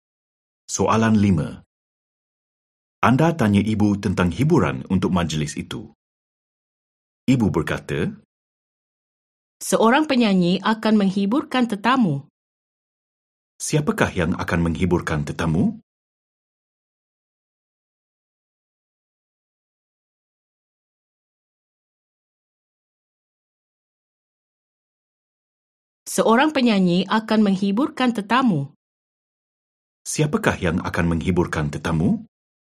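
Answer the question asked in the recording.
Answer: Seorang penyanyi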